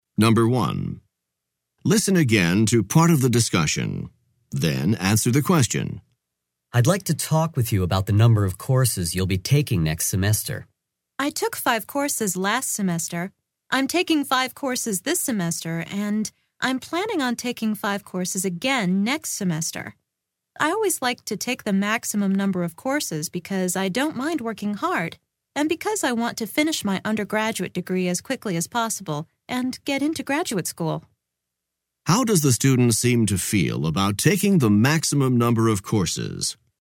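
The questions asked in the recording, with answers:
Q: How does the student seem to feel about taking the maximum number of courses?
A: Positive; the student likes it and doesn't mind working hard, to finish the degree quickly and get into graduate school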